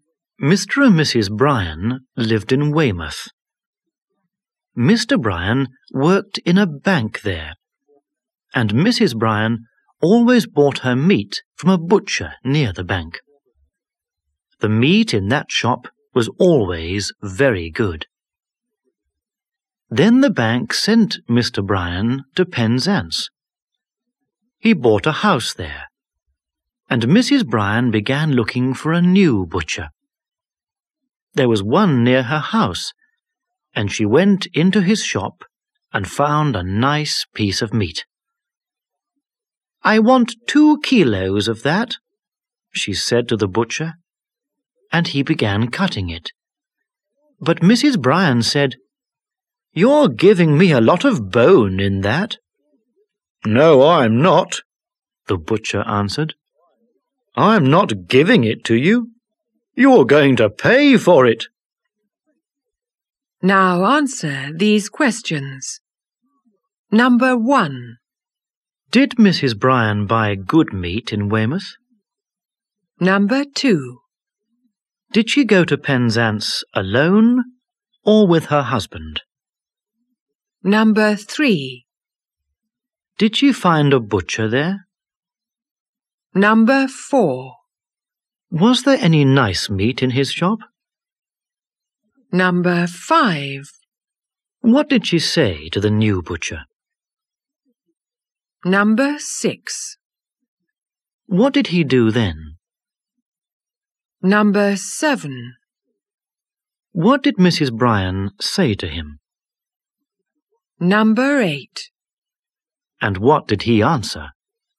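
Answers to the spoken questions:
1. Yes, she did.
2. With her husband.
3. Yes, she did (one near her house).
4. Yes, there was.
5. "I want 2 kilos of that."
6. He began cutting it.
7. "You're giving me a lot of bone in that."
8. "No, I'm not giving it to you. You're going to pay for it."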